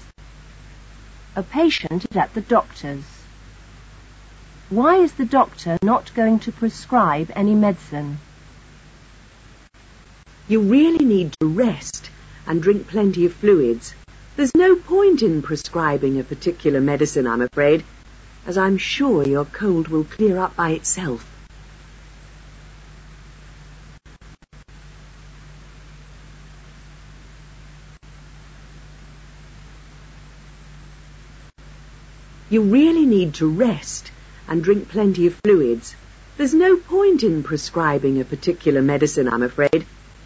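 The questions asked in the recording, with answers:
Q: Why is the doctor not going to prescribe any medicine?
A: The cold will clear up by itself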